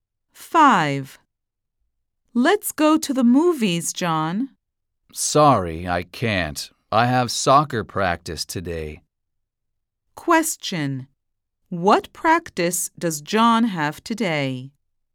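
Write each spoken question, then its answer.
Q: What practice does John have today?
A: soccer practice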